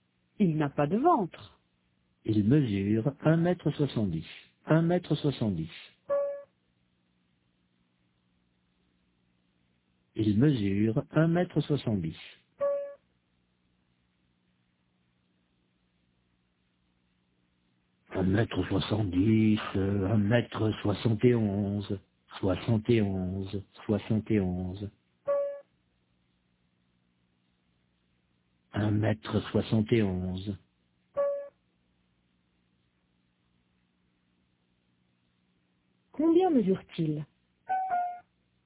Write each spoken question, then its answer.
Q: Combien mesure-t-il?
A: Un mètre soixante-dix.